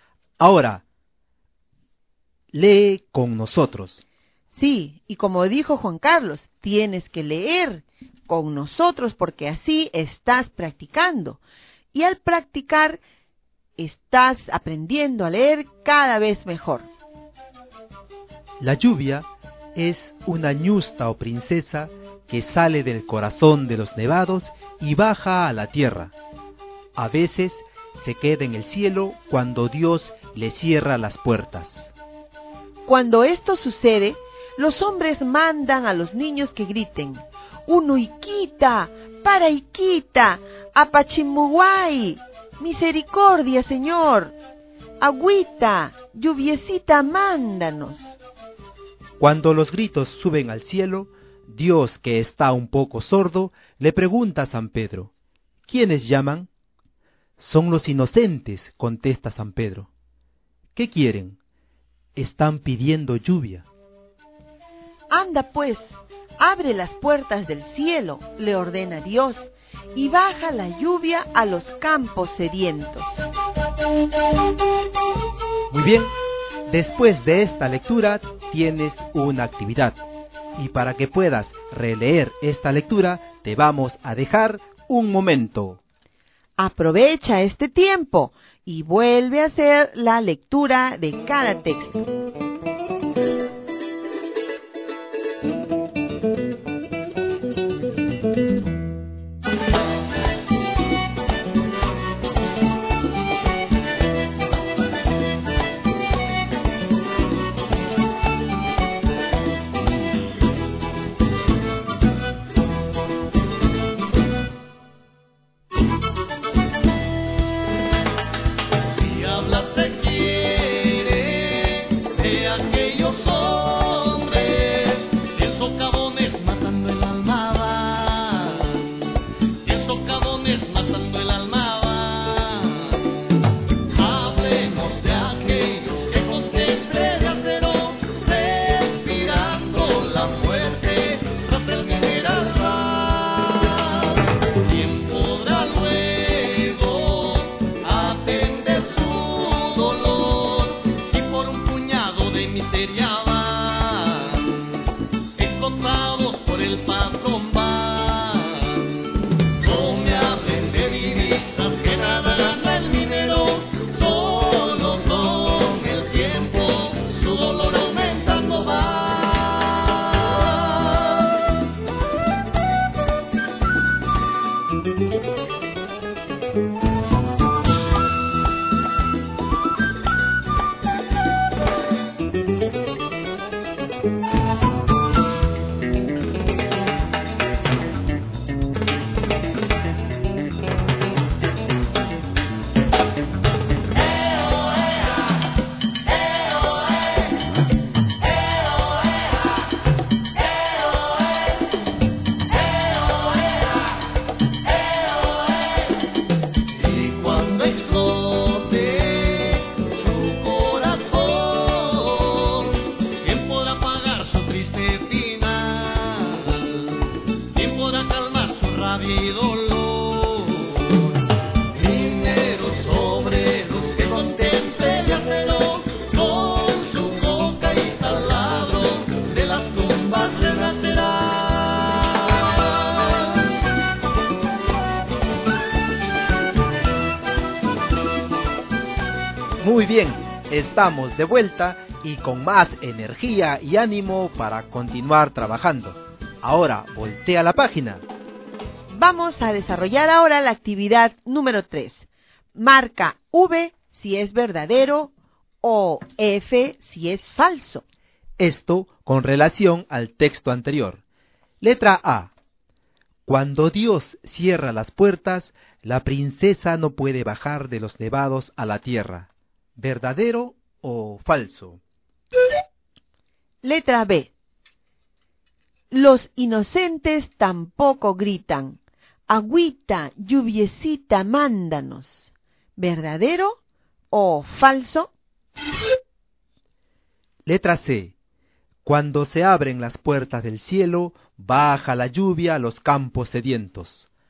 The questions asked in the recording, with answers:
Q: Letra A. Cuando Dios cierra las puertas, la princesa no puede bajar de los nevados a la tierra.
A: Bueno, Juan Carlos, en la letra A yo he marcado verdadero.

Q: Letra B. Los inocentes tampoco gritan.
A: Y en la letra B, se debía marcar falso.

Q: Letra C. Cuando se abren las puertas del cielo, baja la lluvia a los campos sedientos.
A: Y en la letra C, la respuesta era verdadero.